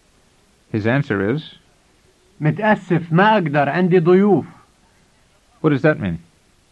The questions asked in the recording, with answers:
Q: What does that mean?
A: It means, sorry, I can't, I have guests.